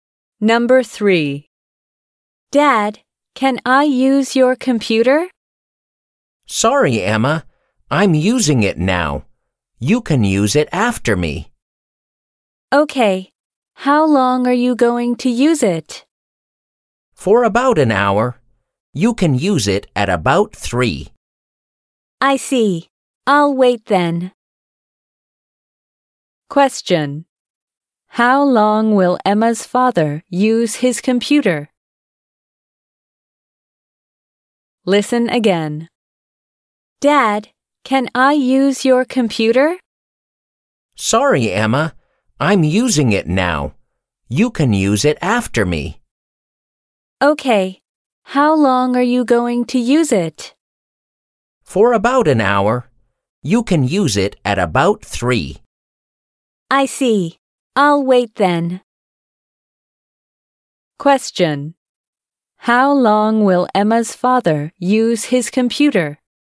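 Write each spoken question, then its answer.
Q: How long will Emma's father use his computer?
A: For about an hour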